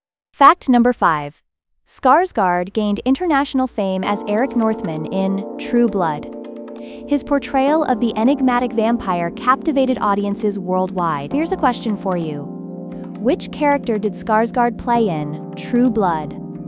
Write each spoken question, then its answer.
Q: Which character did Skarsgård play in True Blood?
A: Correct answer, Eric Northman.